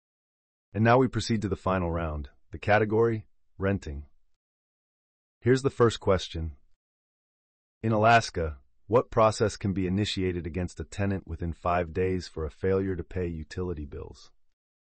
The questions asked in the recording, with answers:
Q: In Alaska, what process can be initiated against a tenant within 5 days for a failure to pay utility bills?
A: The answer is eviction.